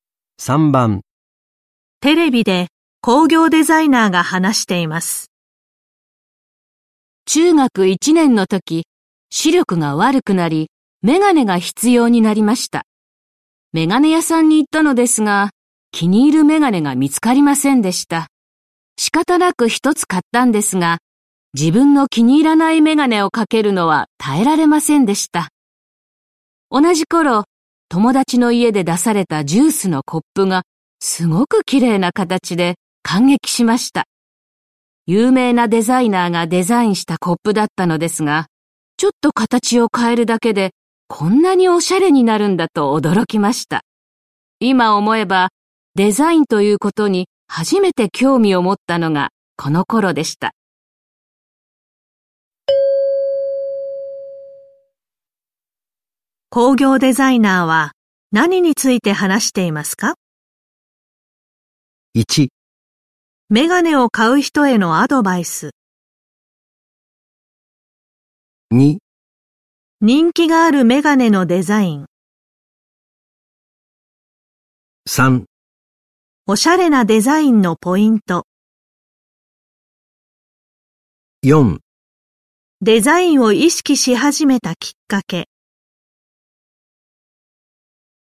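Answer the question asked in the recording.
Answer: 4: デザインを意識し始めたきっかけ。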